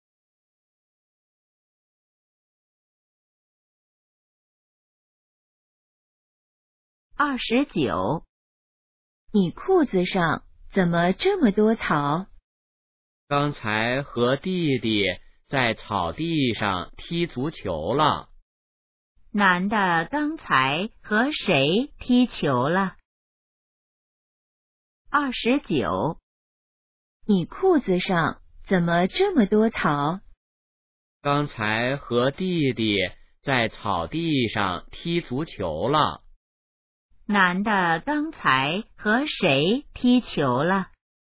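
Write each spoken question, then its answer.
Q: 男的刚才和谁踢球了?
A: 弟弟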